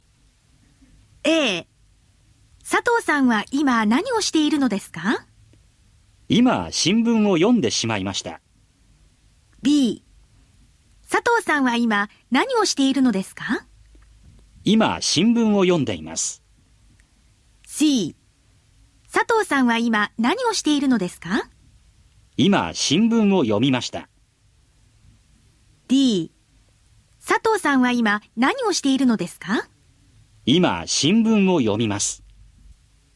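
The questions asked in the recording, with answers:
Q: 佐藤さんは今何をしているのですか?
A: B: 今新聞を読んでいます。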